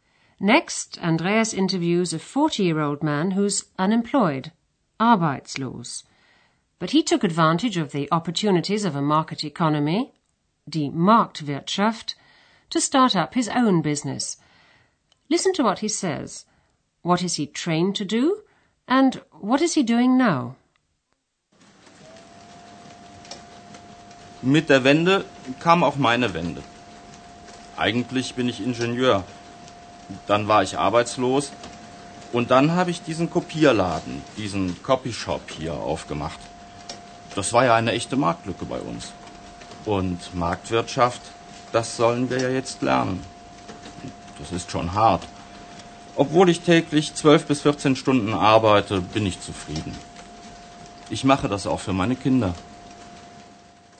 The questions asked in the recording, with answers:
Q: What is he trained to do?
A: The man has a degree in engineering.

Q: And what is he doing now?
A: When he lost his job, he opened up a photocopying shop, ein Kopierladen, or as they say in German too, ein copy shop.